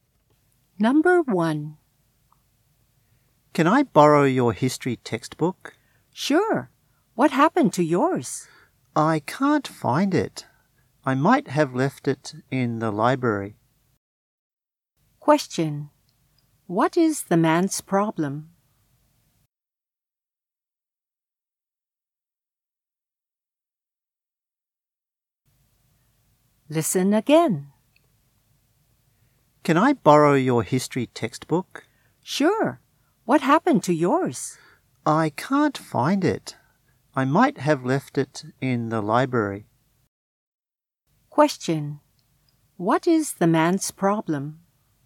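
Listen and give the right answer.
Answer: He can't find his history textbook.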